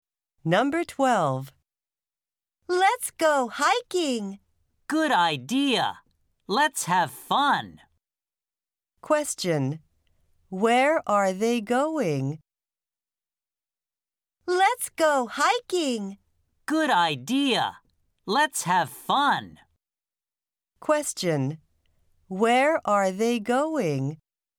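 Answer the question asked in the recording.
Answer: Hiking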